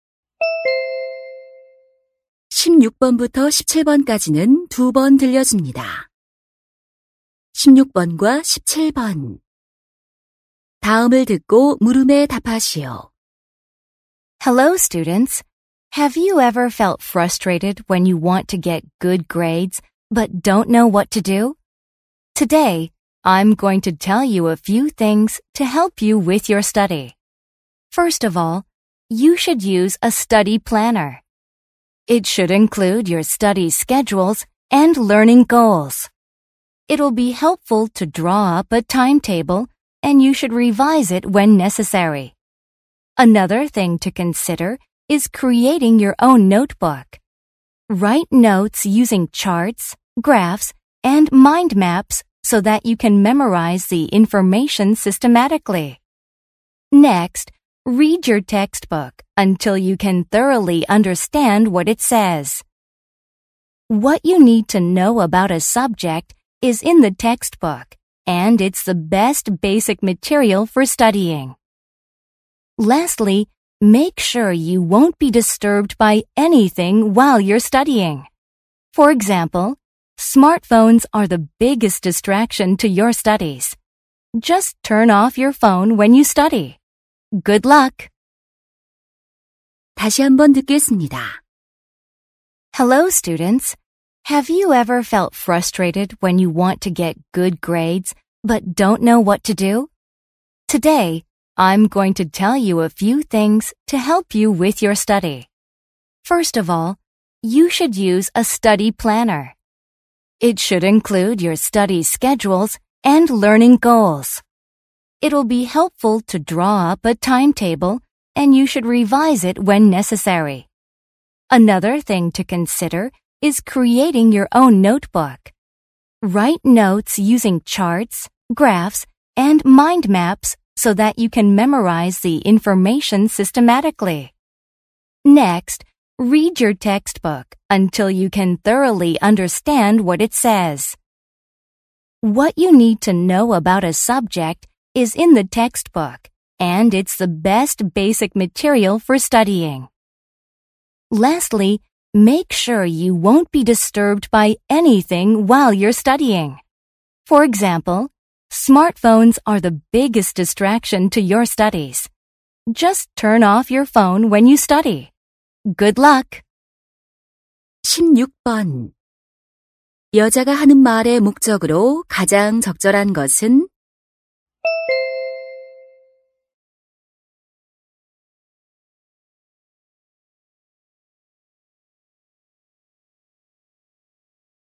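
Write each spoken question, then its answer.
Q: 여자가 하는 말의 목적으로 가장 적절한 것은?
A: 성적을 올리는 공부 방법을 조언하려고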